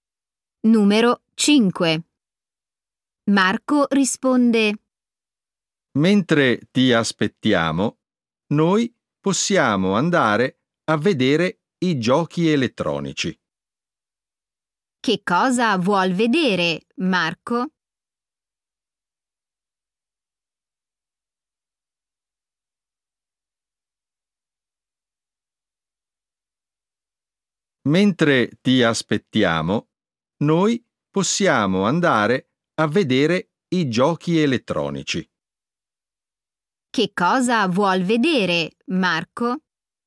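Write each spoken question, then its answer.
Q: Che cosa vuol vedere, Marco?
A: i giochi elettronici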